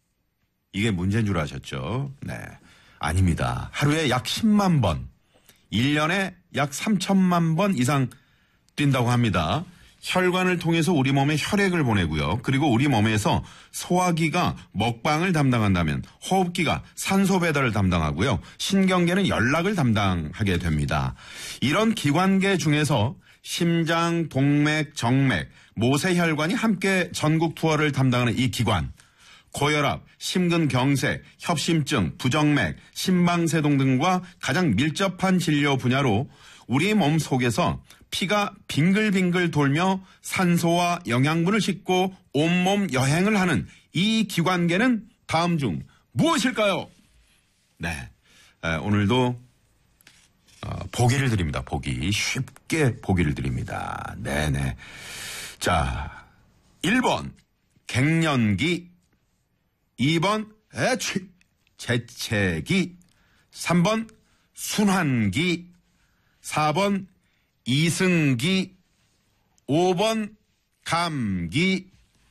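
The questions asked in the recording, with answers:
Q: 고혈압, 심근경색, 협심증, 부정맥, 심방세동 등과 가장 밀접한 진료 분야로 우리 몸 속에서 피가 빙글빙글 돌며 산소와 영양분을 싣고 온몸 여행을 하는 이 기관계는 다음 중 무엇일까요?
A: 3: 순환기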